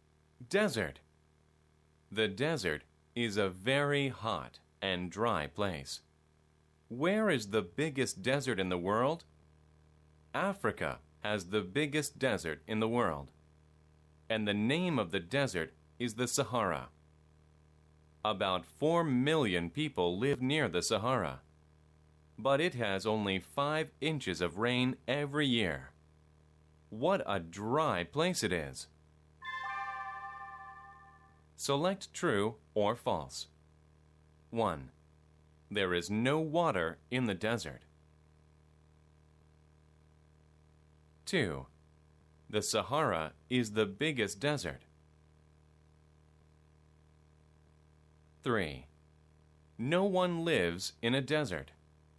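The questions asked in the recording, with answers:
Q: There is no water in the desert.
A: False

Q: The Sahara is the biggest desert.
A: True

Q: No one lives in a desert.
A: False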